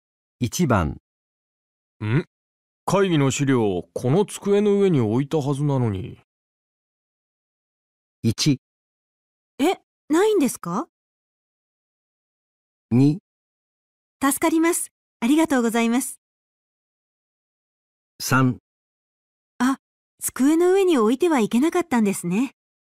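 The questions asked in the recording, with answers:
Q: ん会議の資料この机の上に置いたはずなのに。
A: 1: え、ないんですか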